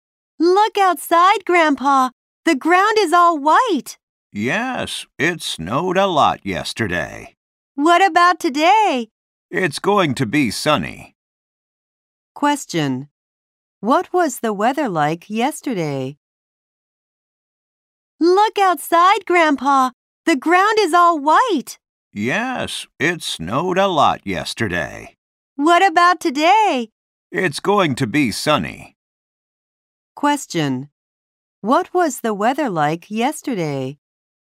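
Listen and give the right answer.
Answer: It was snowy.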